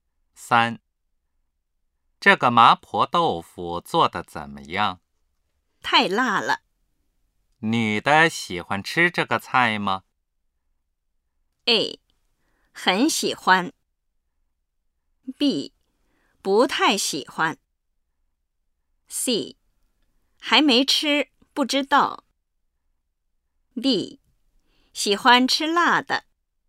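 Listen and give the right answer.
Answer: B: 不太喜欢。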